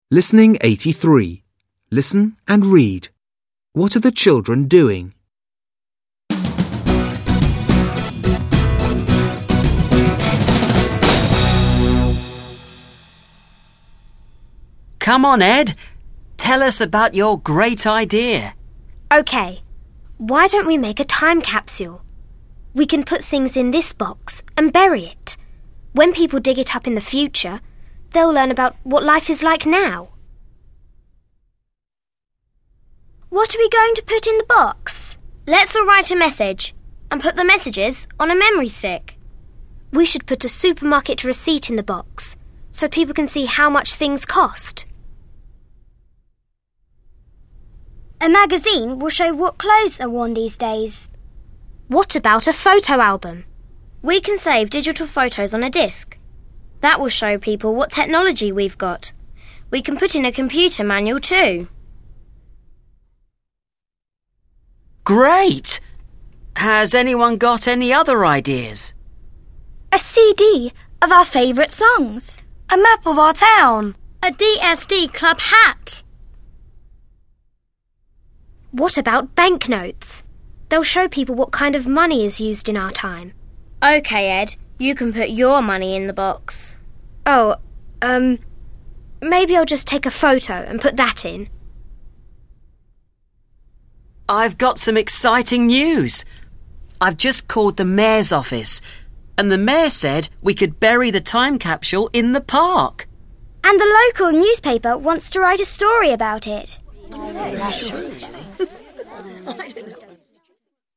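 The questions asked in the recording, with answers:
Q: What are the children doing?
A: They are planning a time capsule to bury.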